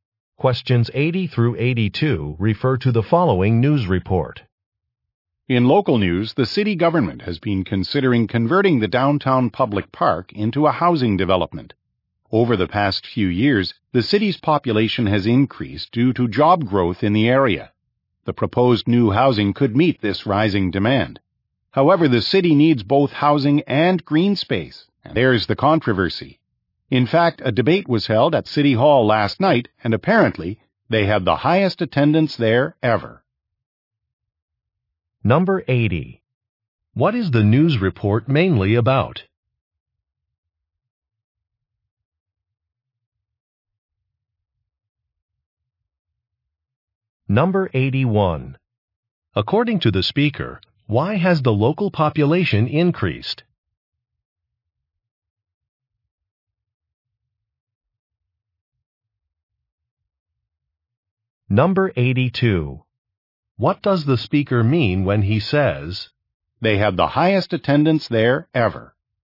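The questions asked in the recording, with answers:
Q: What is the news report mainly about?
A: A plan to turn a park into housing

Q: According to the speaker, why has the local population increased?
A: Job growth in the area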